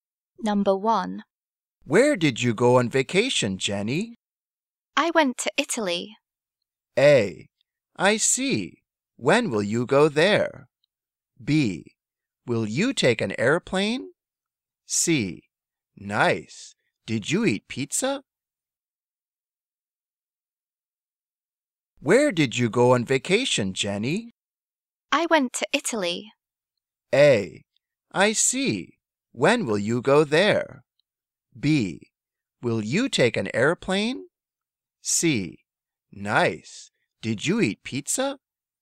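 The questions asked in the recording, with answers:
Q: I went to Italy.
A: C: Nice. Did you eat pizza?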